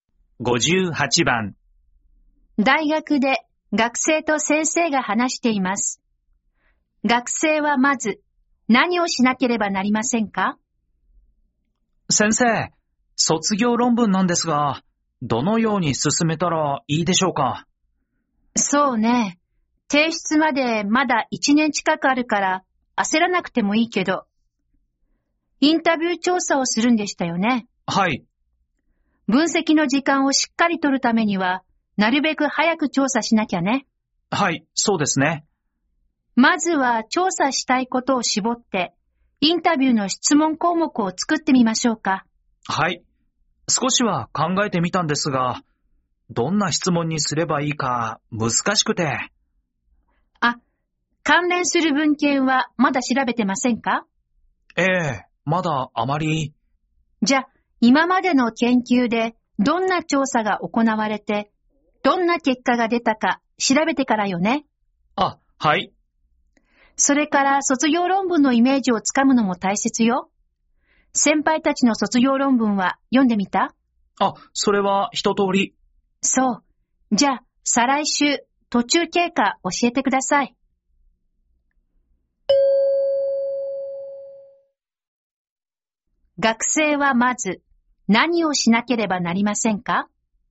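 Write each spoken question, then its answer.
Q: 学生はまず、何をしなければなりませんか?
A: 関連する文献(先行研究)を調べる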